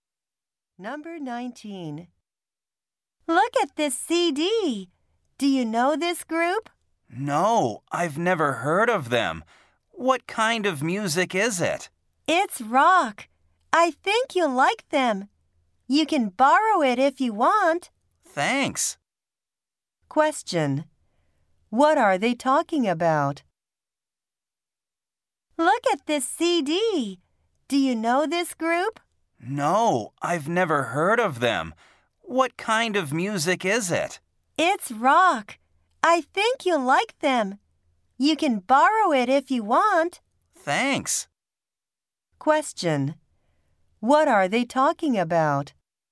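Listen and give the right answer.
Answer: A rock CD (music group).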